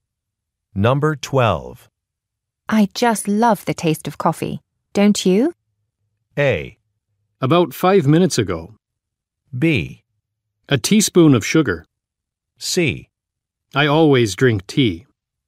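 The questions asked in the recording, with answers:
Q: I just love the taste of coffee, don't you?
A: C: I always drink tea.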